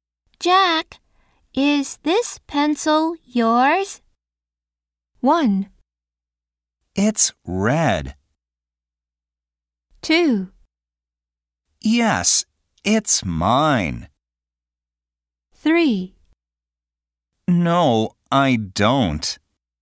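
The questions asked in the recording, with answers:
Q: Jack, is this pencil yours?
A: 2: Yes, it's mine.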